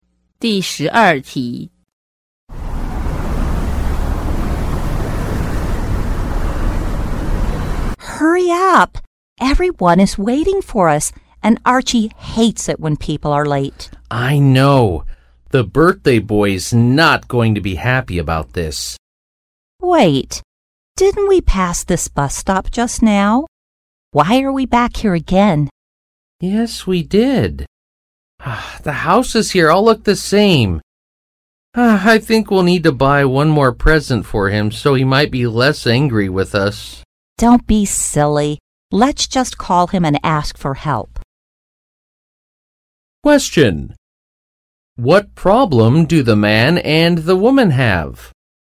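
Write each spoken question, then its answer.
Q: What problem do the man and the woman have?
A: They are lost and late for Archie's birthday.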